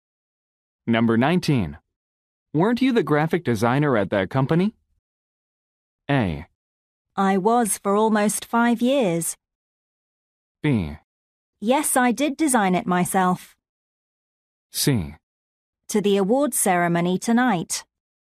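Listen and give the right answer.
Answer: A: I was for almost 5 years.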